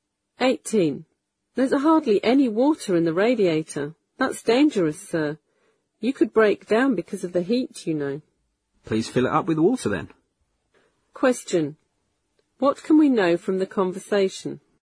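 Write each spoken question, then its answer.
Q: What can we know from the conversation?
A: The car's radiator needs water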